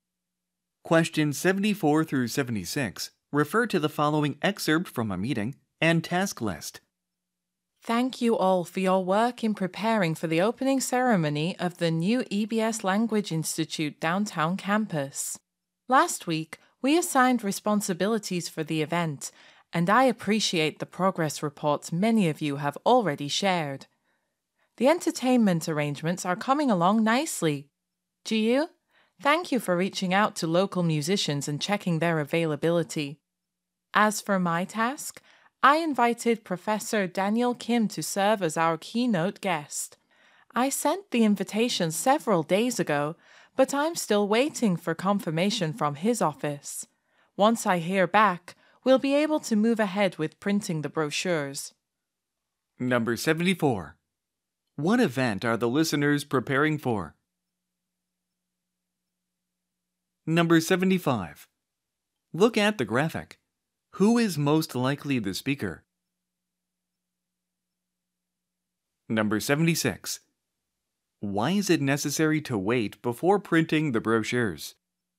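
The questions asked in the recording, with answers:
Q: What event are the listeners preparing for?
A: The opening ceremony of the new EBS Language Institute downtown campus

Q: Why is it necessary to wait before printing the brochures?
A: The keynote guest, Professor Daniel Kim, has not yet confirmed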